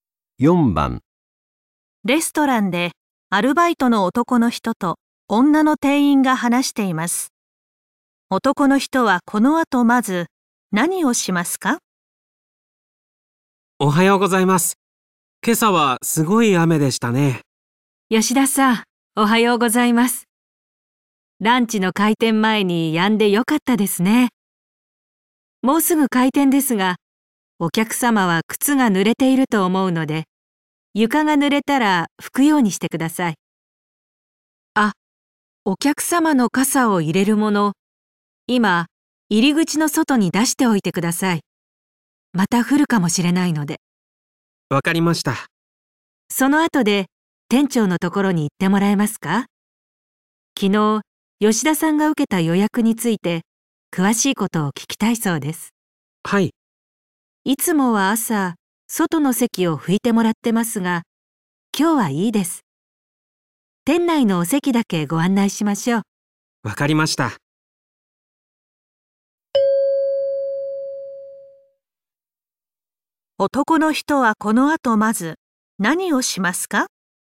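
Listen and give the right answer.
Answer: 傘を入れるものを入り口の外に出す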